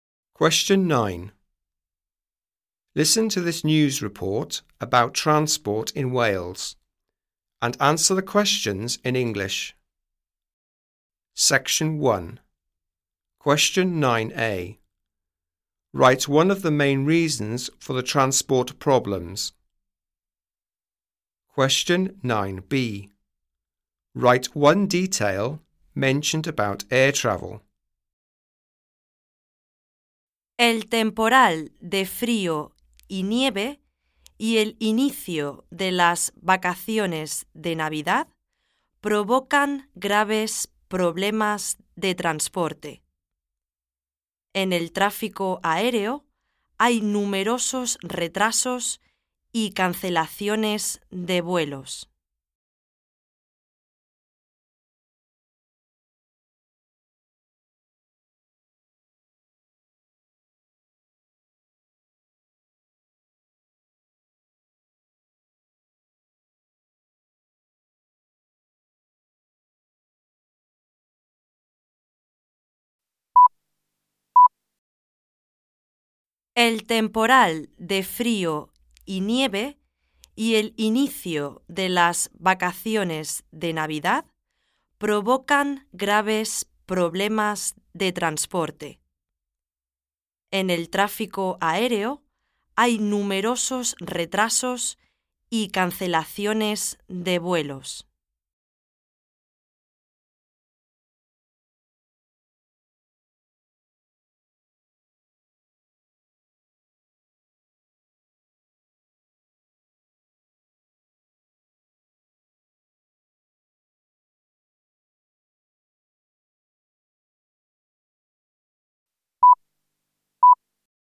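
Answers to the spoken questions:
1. Cold weather and snow, or the start of the Christmas holidays
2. Many flight delays and cancellations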